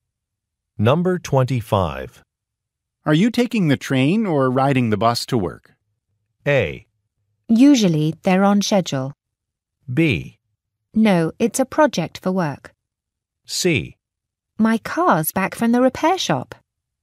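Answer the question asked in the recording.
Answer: C: My car's back from the repair shop.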